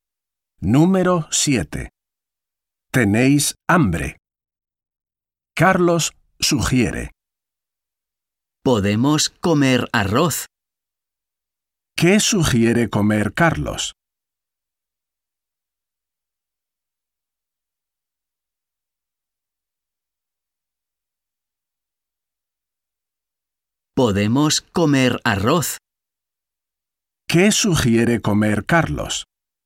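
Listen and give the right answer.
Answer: arroz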